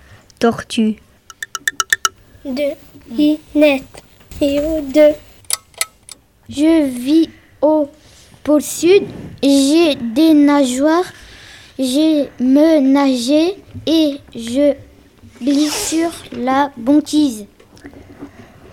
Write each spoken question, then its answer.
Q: Je vis au pôle sud. J'ai des nageoires. J'ai me nagé et je glisse sur la banquise.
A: Je suis le manchot.